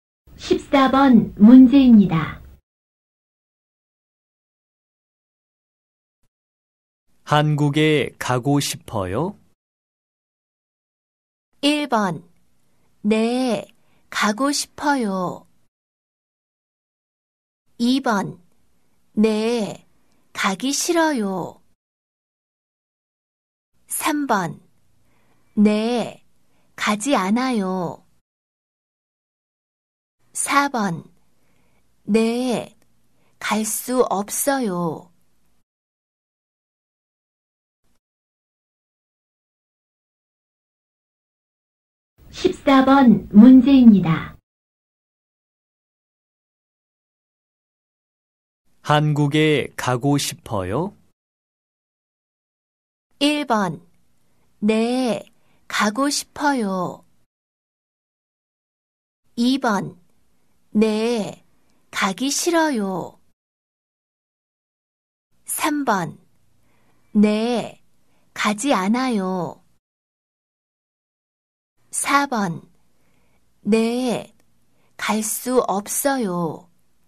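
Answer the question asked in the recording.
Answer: 1: 네, 가고 싶어요.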